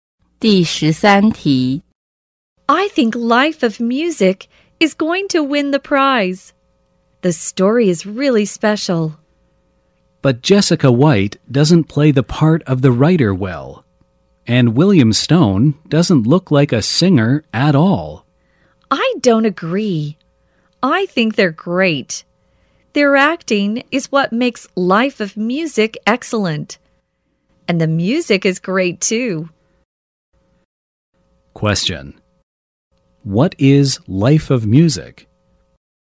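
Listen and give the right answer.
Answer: A movie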